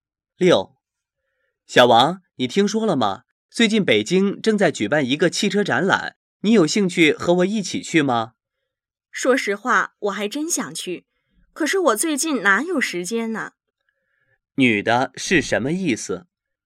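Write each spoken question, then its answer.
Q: 女的是什么意思?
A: 她想去,但是最近没有时间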